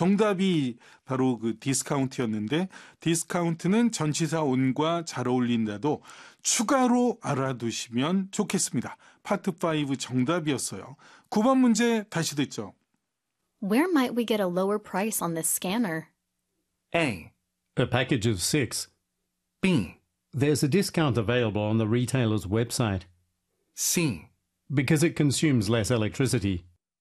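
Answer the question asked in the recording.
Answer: B: There's a discount available on the retailer's website.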